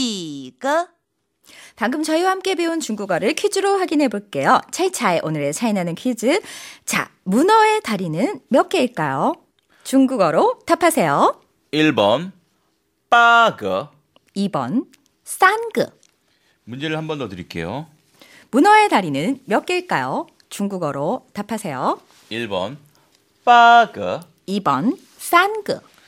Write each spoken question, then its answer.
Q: 문어의 다리는 몇 개일까요? 중국어로 답하세요.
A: 그래서 정답은 1번.